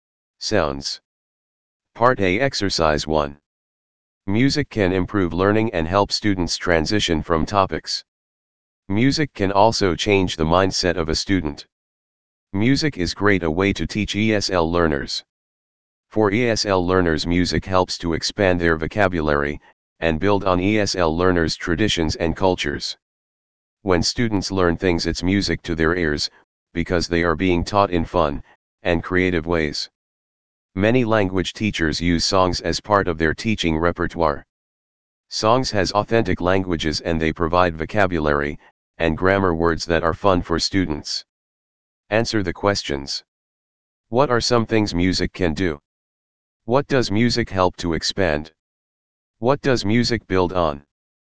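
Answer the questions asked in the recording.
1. Improve learning, help students transition from topics, and change a student's mindset
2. ESL learners' vocabulary
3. ESL learners' traditions and cultures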